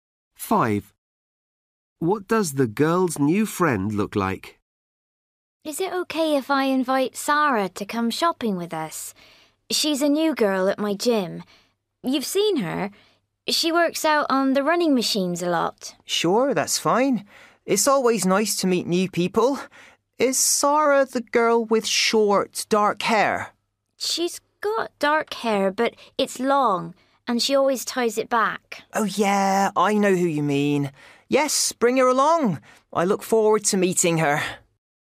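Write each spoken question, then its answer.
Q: What does the girl's new friend look like?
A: long dark hair, tied back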